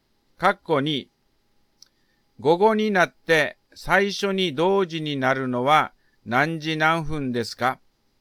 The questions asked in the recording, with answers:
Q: 括弧2、午後になって最初に同時になるのは何時何分ですか?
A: 午前9時から3時間44分後は午後12時44分ですね。